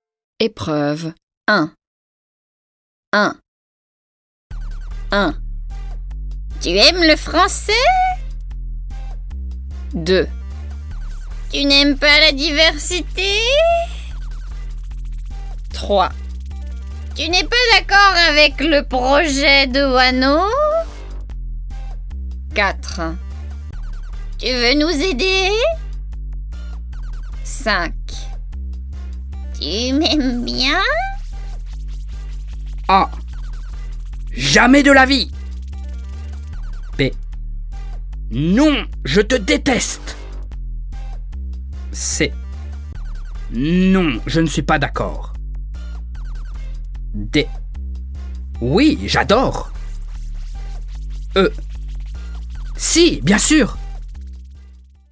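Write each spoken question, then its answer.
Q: Tu aimes le français ?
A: D: Oui, j'adore !

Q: Tu n'aimes pas la diversité ?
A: E: Si, bien sûr !

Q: Tu n'es pas d'accord avec le projet de Wano ?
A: C: Non, je ne suis pas d'accord.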